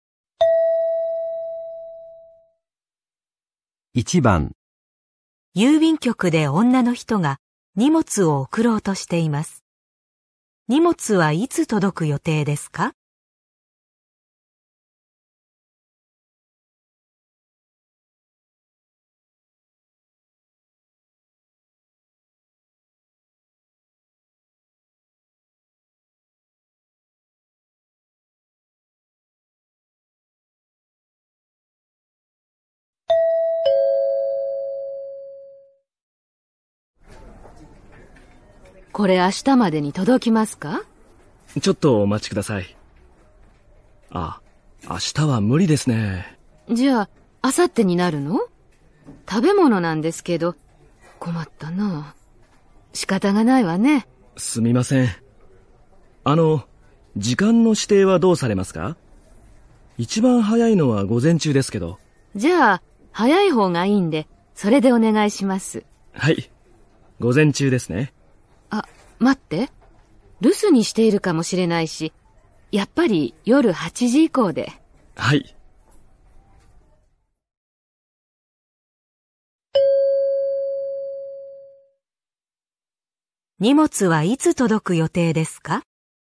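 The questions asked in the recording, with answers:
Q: 荷物はいつ届く予定ですか?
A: 明後日の夜8時以降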